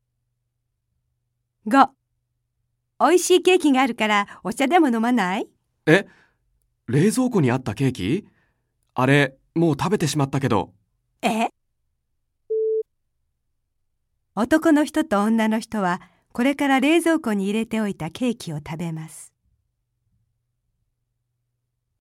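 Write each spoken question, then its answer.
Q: 男の人と女の人はこれから冷蔵庫に入れておいたケーキを食べます。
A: ×(正しくない)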